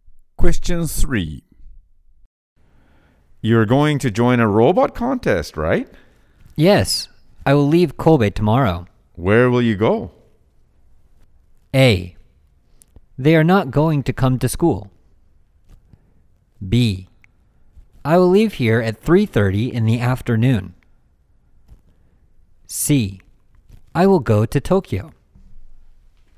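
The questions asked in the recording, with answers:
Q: Where will you go?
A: C: I will go to Tokyo.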